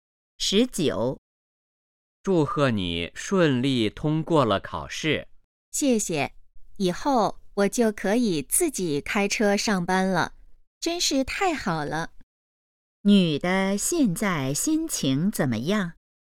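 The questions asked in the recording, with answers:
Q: 女的现在心情怎么样?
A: 很高兴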